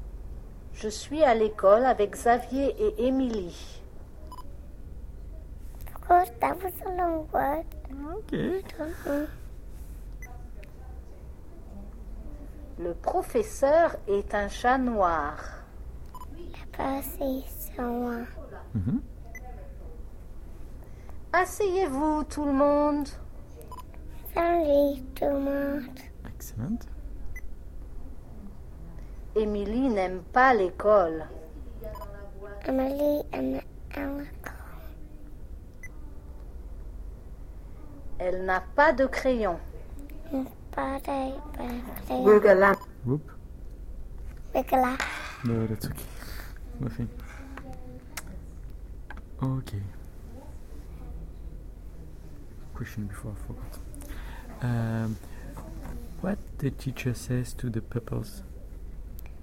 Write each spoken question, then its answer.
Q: What the teacher says to the pupils?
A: He said, asseyez-vous.